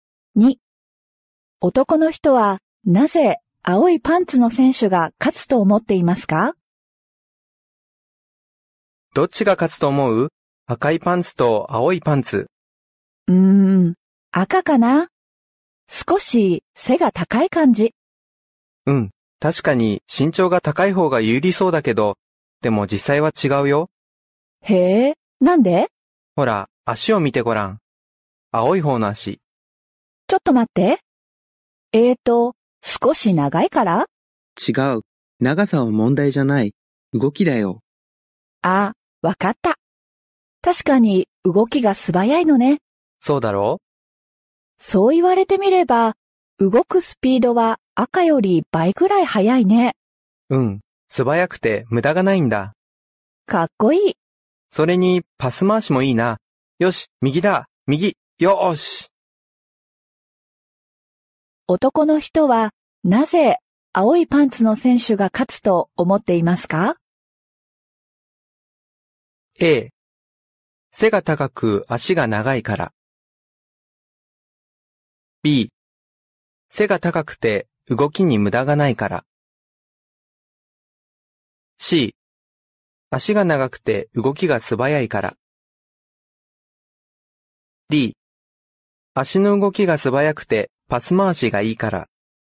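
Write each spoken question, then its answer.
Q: 男の人は、なぜ、青いパンツの選手が勝つと思っていますか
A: D: 足の動きが素早くてパス回しがいいから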